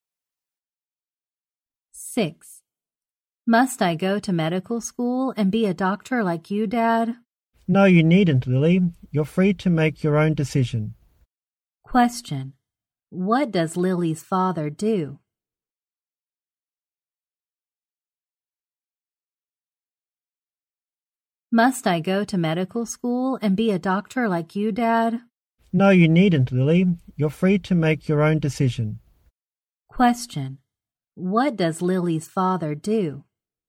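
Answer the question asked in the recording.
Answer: He is a doctor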